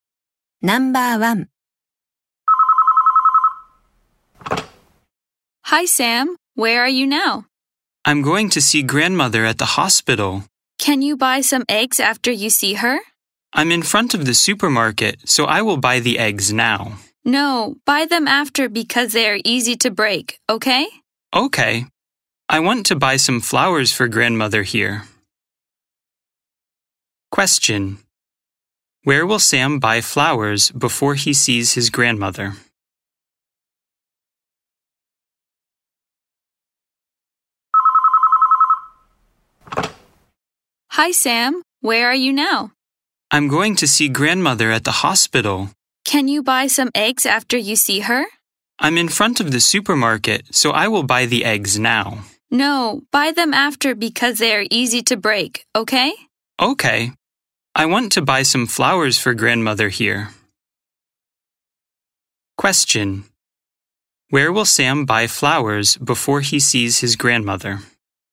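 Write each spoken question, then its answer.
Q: Where will Sam buy flowers before he sees his grandmother?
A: At the supermarket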